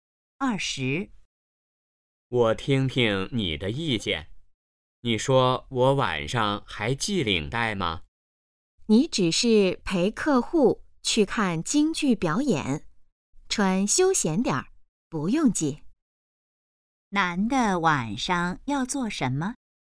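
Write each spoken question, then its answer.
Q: 男的晚上要做什么?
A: 陪客户看京剧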